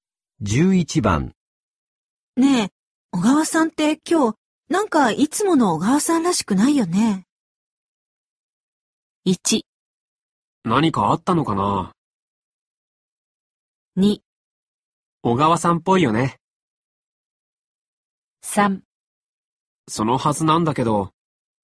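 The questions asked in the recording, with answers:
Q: ねえ、小川さんって今日、なんかいつもの小川さんらしくないよね。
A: 1: 何かあったのかな?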